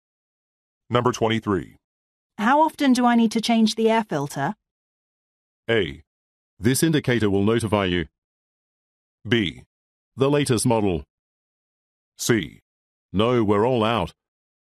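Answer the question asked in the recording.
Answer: A: This indicator will notify you.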